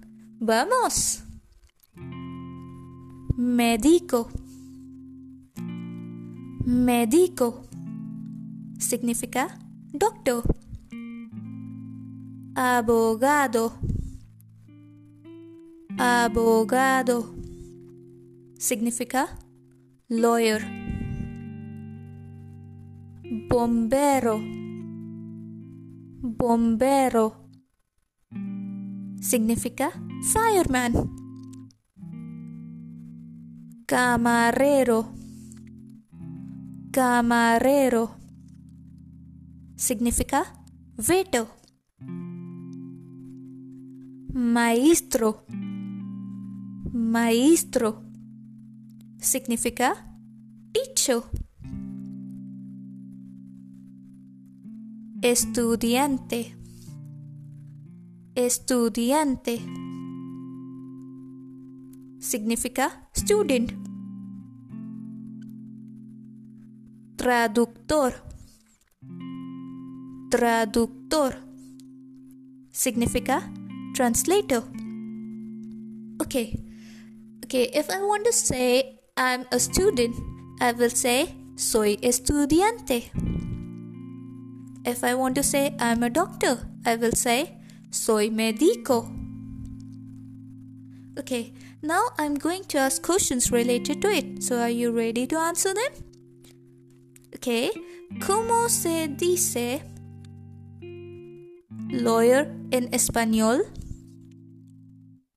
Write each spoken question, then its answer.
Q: ¿cómo se dice lawyer in español?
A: la respuesta correcta es abogado